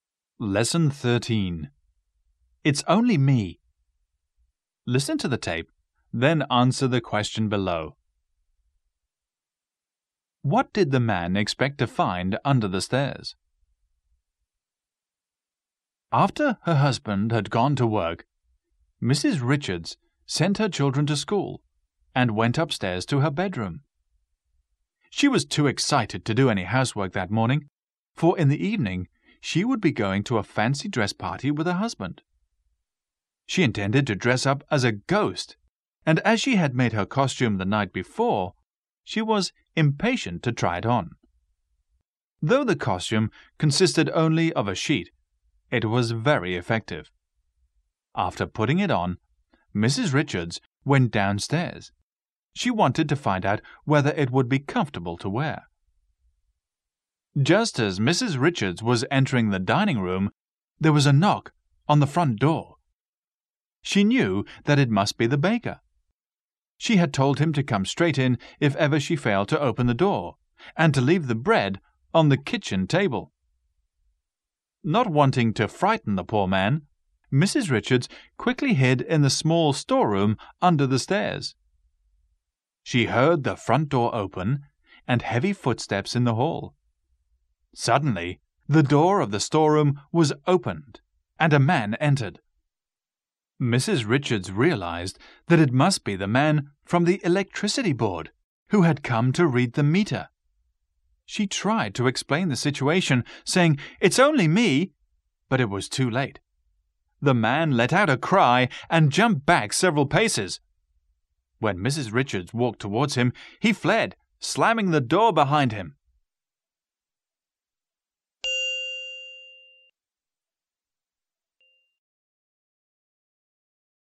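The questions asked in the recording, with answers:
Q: What did the man expect to find under the stairs?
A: The electricity meter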